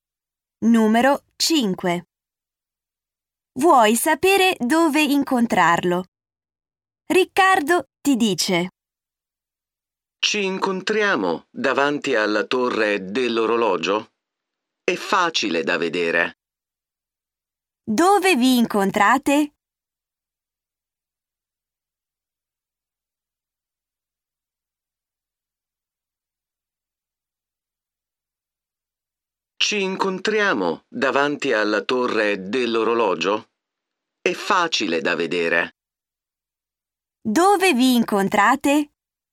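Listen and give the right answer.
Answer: Davanti alla torre dell'orologio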